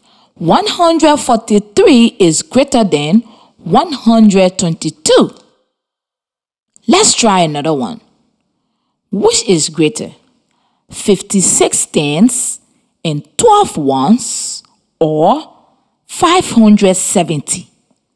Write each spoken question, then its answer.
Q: Which is greater, 56 tens and 12 ones or 570?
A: I use a place value chart to show that 56 tens and 12 ones is greater than 570.